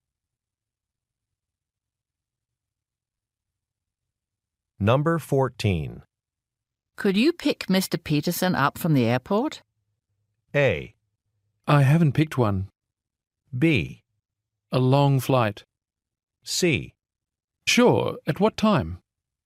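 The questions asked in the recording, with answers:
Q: Could you pick Mr. Peterson up from the airport?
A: C: Sure, at what time?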